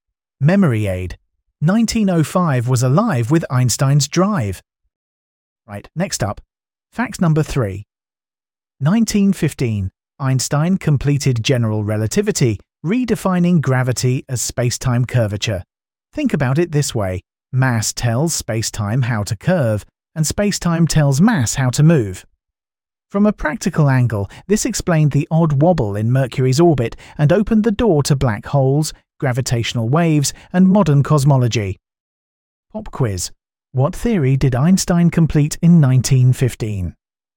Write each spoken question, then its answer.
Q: What theory did Einstein complete in 1915?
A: general relativity.